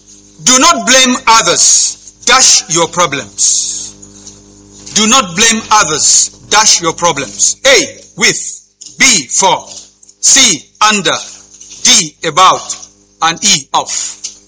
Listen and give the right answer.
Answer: B, for. A round of applause for them.